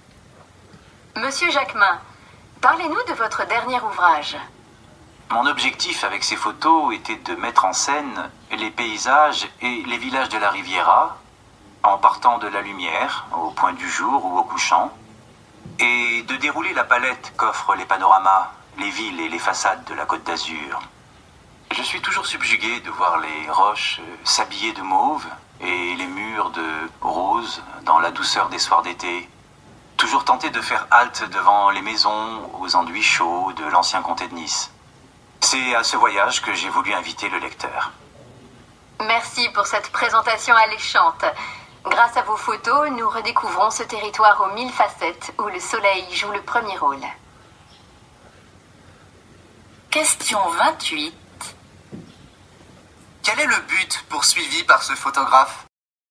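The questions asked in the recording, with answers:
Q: Quel est le but poursuivi par ce photographe ?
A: Mettre en valeur les couleurs et la lumière des paysages et villages de la Côte d'Azur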